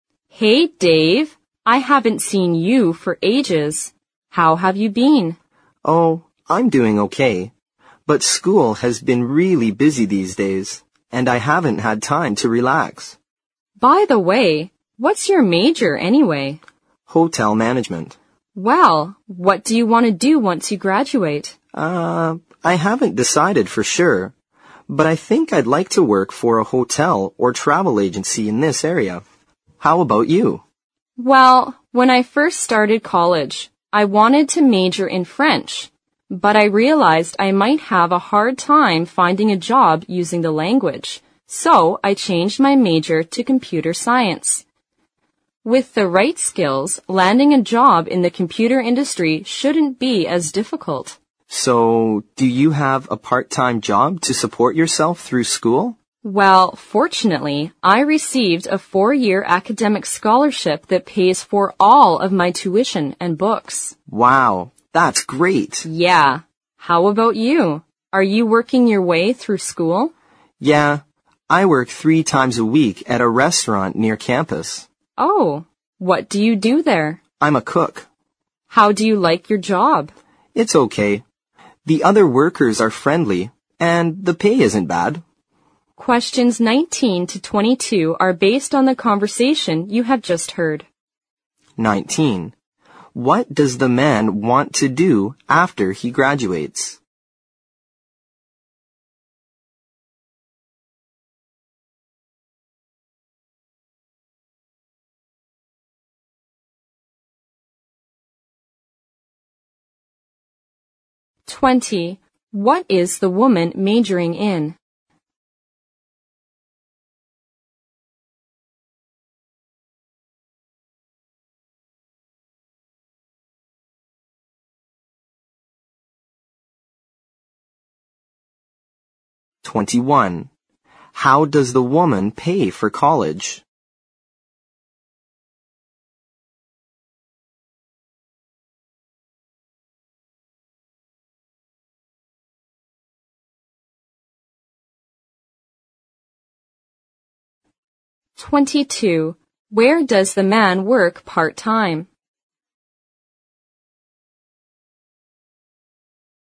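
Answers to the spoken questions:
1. Work for a hotel or travel agency in the area
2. Computer science
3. With a 4-year academic scholarship
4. At a restaurant near campus (as a cook)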